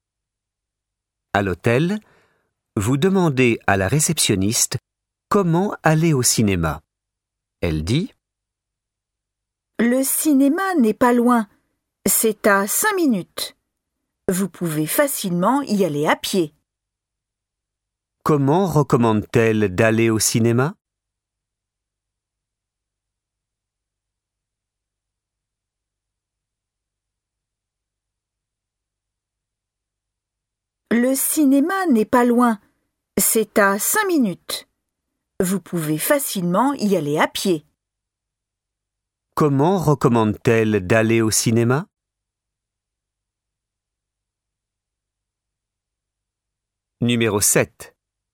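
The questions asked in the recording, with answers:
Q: Comment recommande-t-elle d'aller au cinéma?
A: À pied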